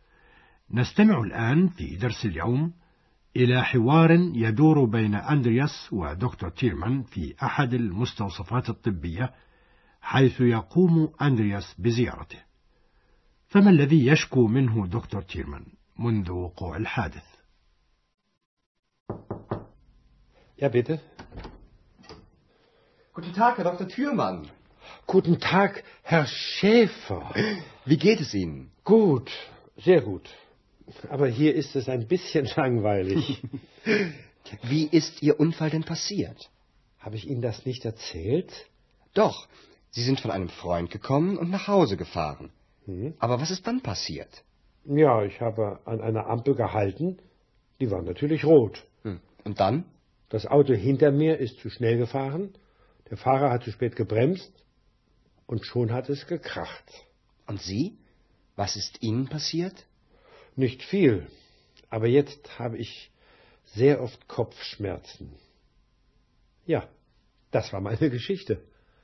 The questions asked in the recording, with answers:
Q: فما الذي يشكو منه دكتور تيرمان منذ وقوع الحادث؟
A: بعد الحادث راح دكتور تيرمان يشكو مرارا من الصداع.